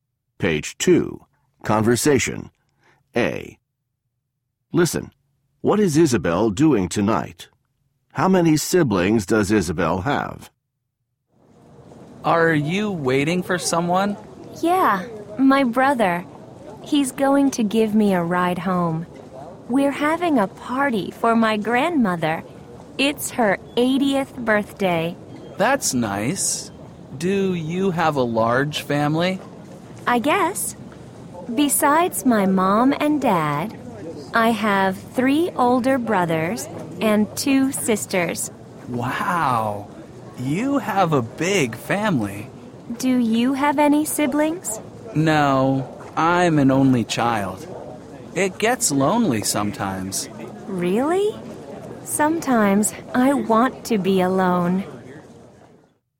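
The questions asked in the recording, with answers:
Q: What is Isabel doing tonight?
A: Having a party for her grandmother's 80th birthday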